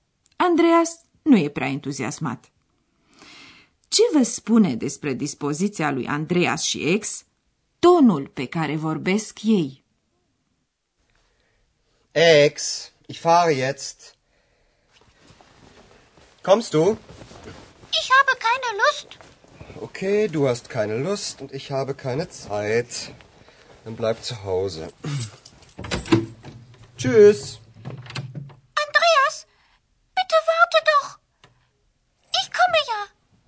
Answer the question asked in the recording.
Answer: Ați remarcat, desigur, că atât Andreas cât și ex n-au niciun chef și că Andreas e cam enervat.